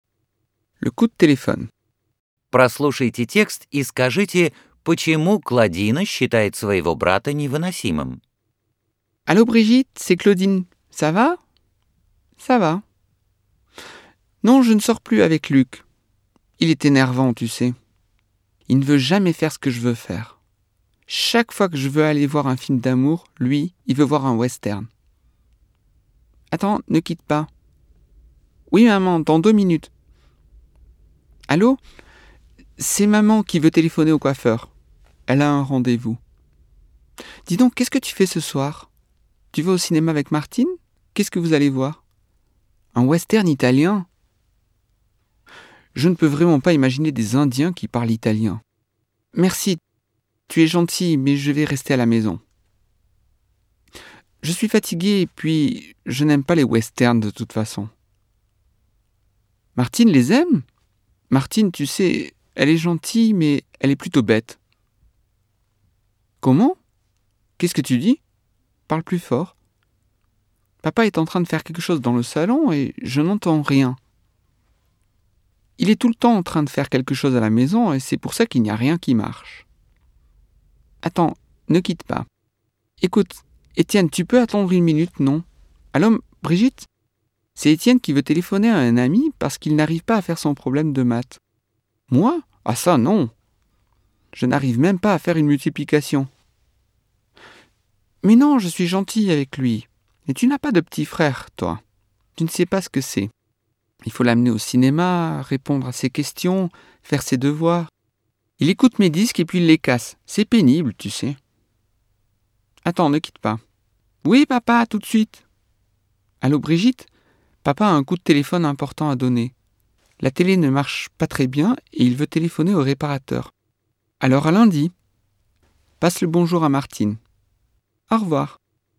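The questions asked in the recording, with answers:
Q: Прослушайте текст и скажите, почему Клодина считает своего брата невыносимым.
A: Его надо водить в кино, отвечать на его вопросы, делать за него уроки; он слушает её пластинки и ломает их.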